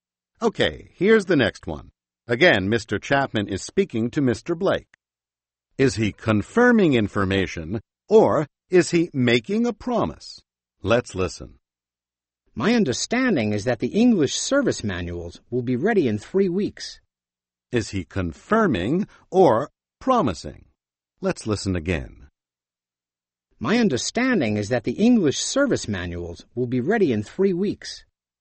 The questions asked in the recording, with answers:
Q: Is he confirming information, or is he making a promise?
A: He's confirming his understanding.